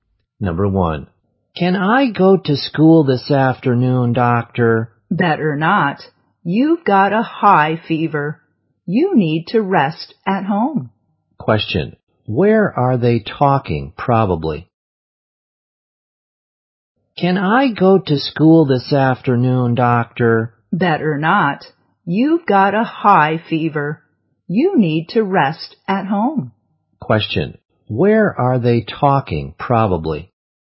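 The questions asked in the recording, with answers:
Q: where are they talking, probably?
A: In a hospital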